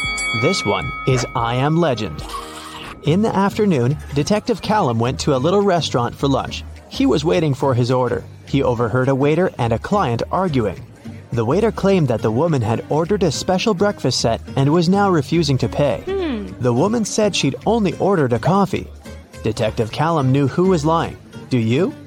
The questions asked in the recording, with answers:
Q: Do you?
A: It's afternoon. No one serves breakfast specials at this time, so the waiter was lying.